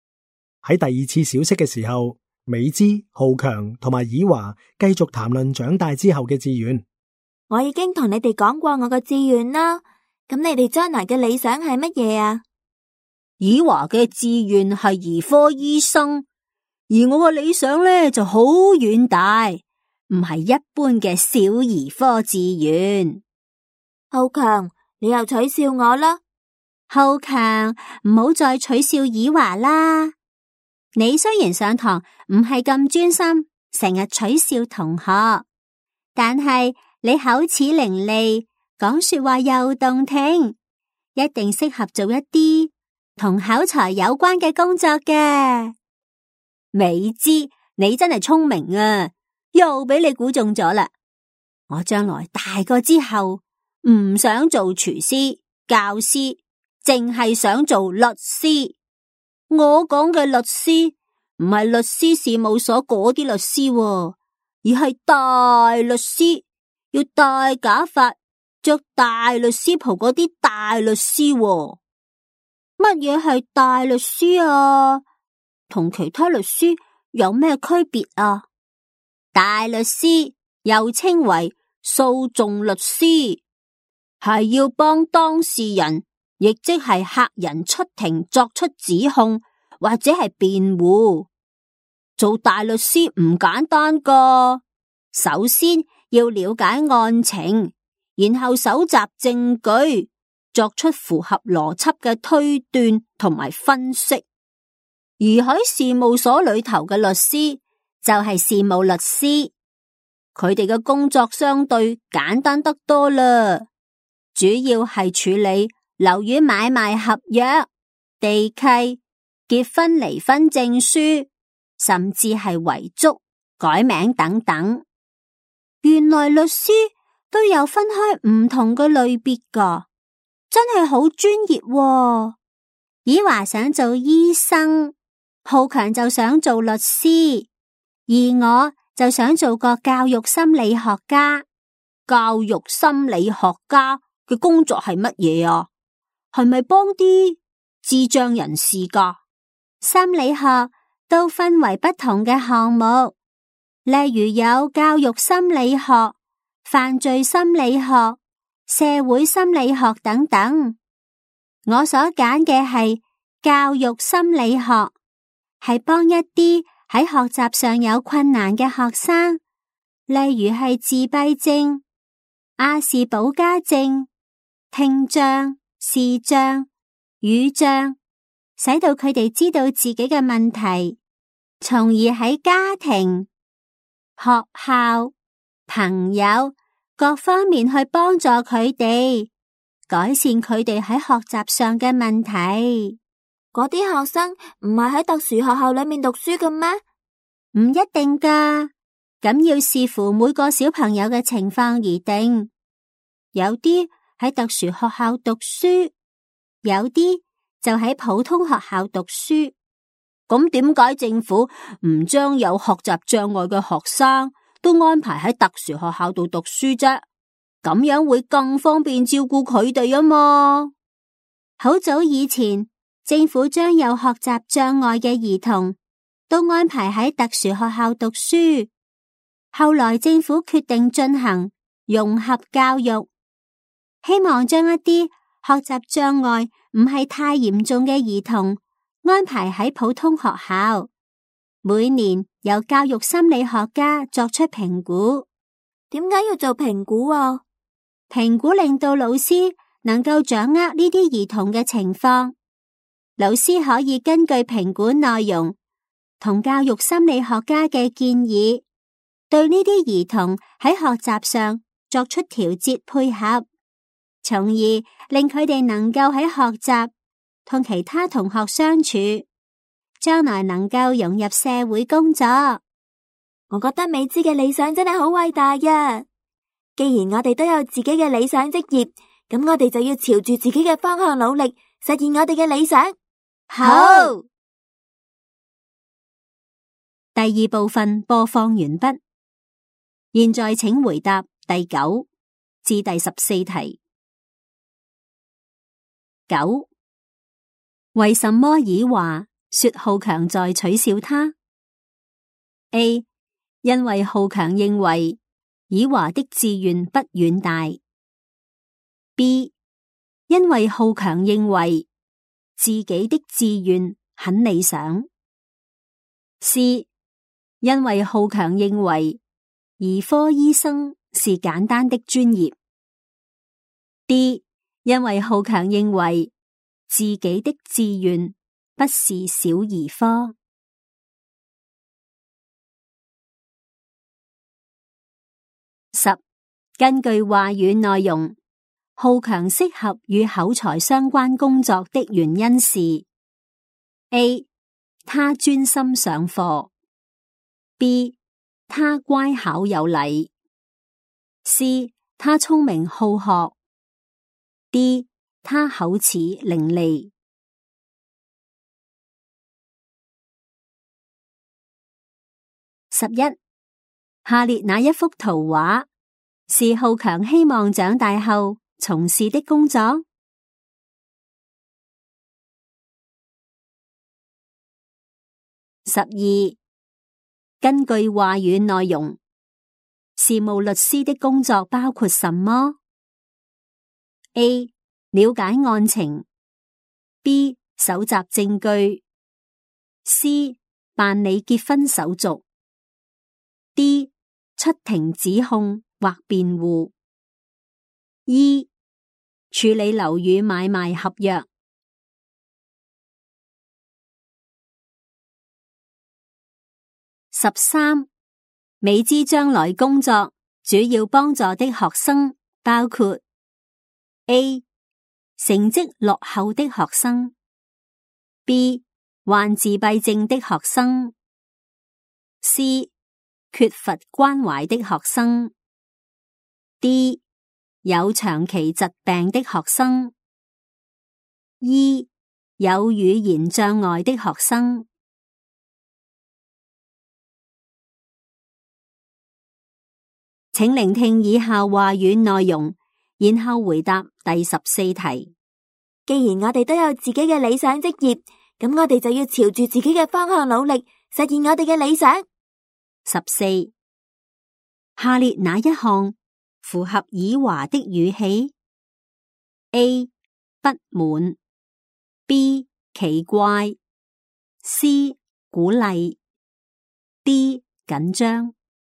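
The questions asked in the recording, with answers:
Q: 根据话语内容,浩强适合与口才相关工作的原因是 A, 他专心上课。 B, 他乖巧有礼。 C, 他聪明好学。 D, 他口齿伶俐。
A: D: 他口齿伶俐

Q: 根据话语内容,事务律师的工作包括什么? A. 了解案情 B. 搜集证据。C. 办理结婚手续。D. 出庭指控或辩护。 E. 处理楼宇买卖合约。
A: C: 办理结婚手续;E: 处理楼宇买卖合约

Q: 美姿将来工作主要帮助的学生包括 A. 成绩落后的学生 B. 患自闭症的学生 C. 缺乏关怀的学生 D. 有长期疾病的学生 E. 有语言障碍的学生。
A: B: 患自闭症的学生;E: 有语言障碍的学生

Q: 下列哪一项符合以华的语气 ?A. 不满 ,B. 奇怪 ,C. 鼓励 ,D. 紧张。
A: C: 鼓励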